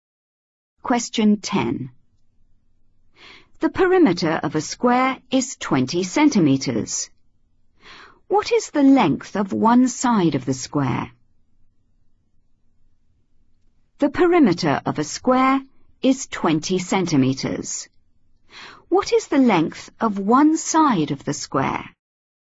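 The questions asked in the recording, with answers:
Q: What is the length of one side of the square?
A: 5 cm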